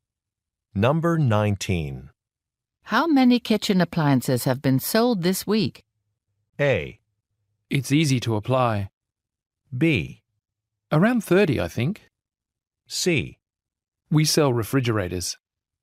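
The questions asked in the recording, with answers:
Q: How many kitchen appliances have been sold this week?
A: B: Around 30, I think.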